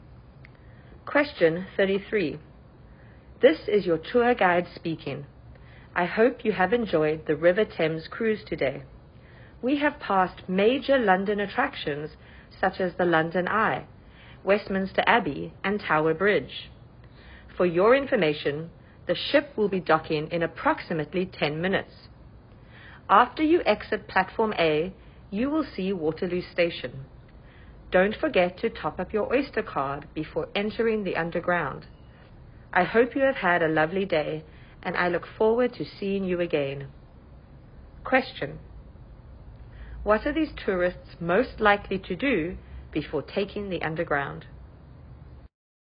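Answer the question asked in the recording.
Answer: Top up their Oyster card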